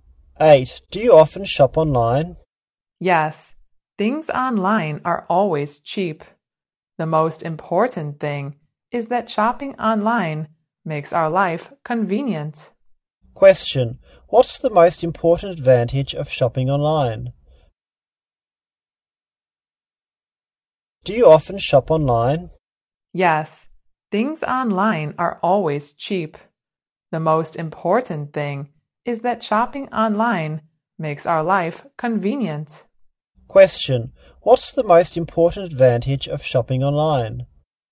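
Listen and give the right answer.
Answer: It makes life convenient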